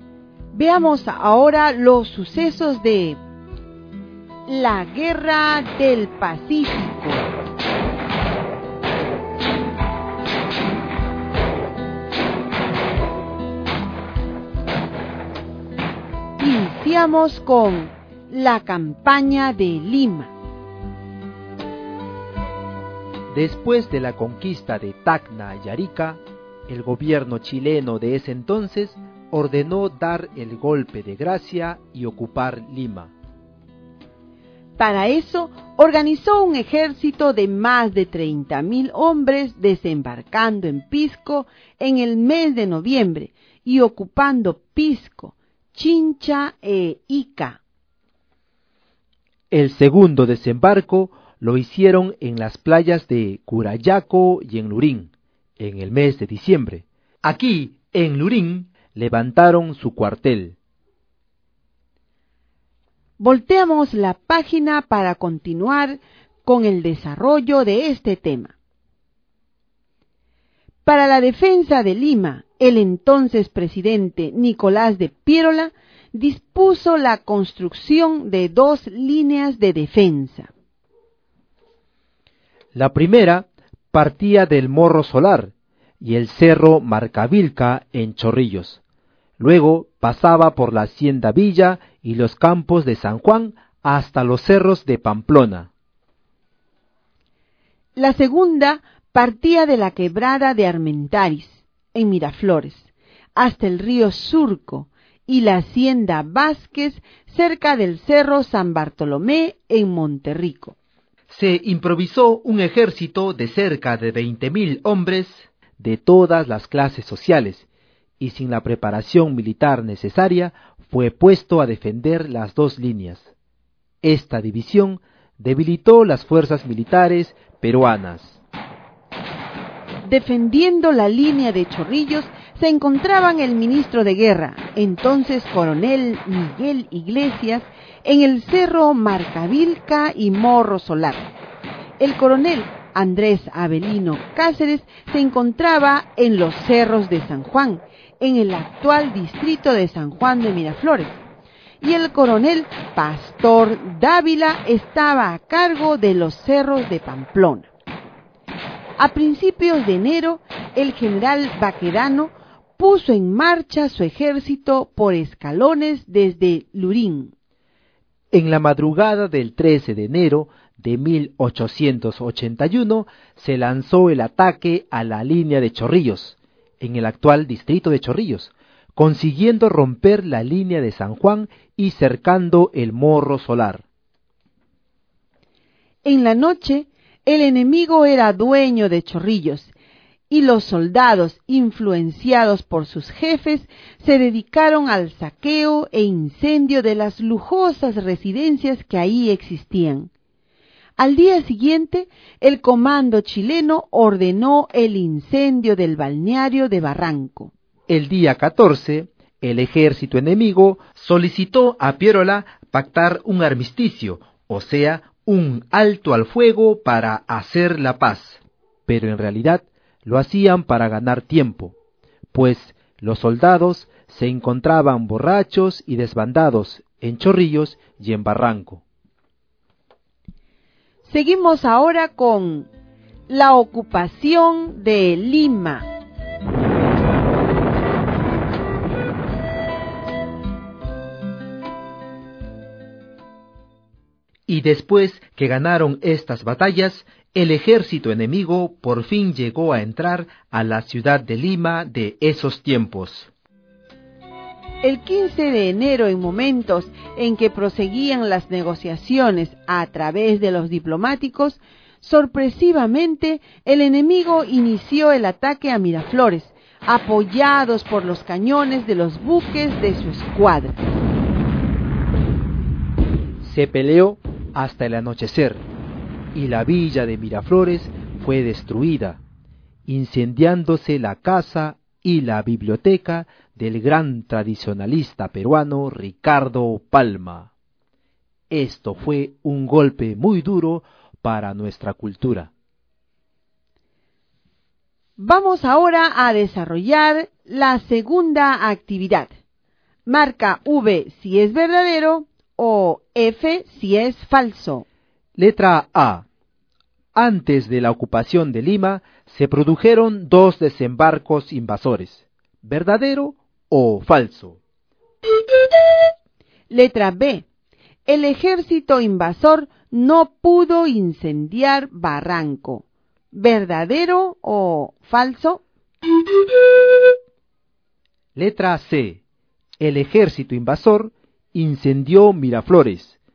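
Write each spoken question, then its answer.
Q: Letra A. Antes de la ocupación de Lima, se produjeron dos desembarcos invasores. ¿Verdadero o falso?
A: Verdadero

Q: Letra B. El ejército invasor no pudo incendiar Barranco. ¿verdadero o falso?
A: Falso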